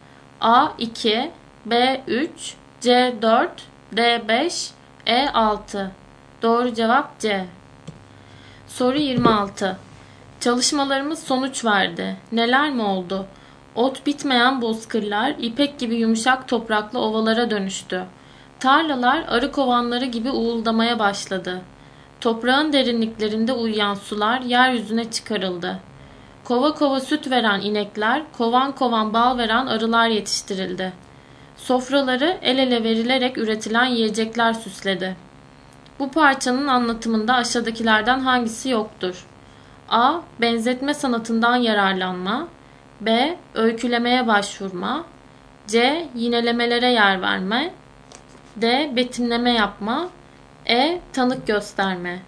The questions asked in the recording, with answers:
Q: Bu parçanın anlatımında aşağıdakilerden hangisi yoktur?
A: Doğru cevap E.